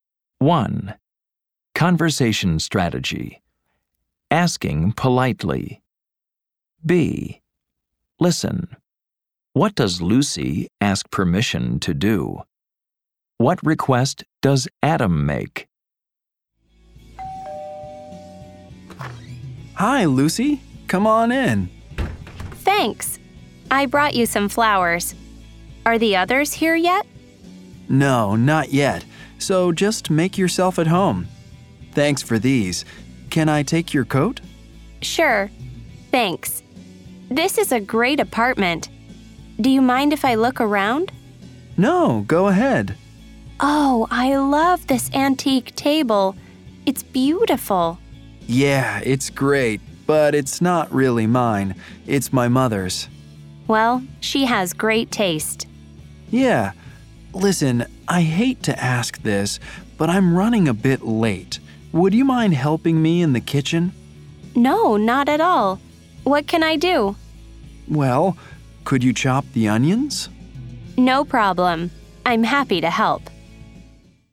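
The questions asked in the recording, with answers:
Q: What does Lucy ask permission to do?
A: To look around Adam's apartment

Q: What request does Adam make?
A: He asks her to help him in the kitchen by chopping the onions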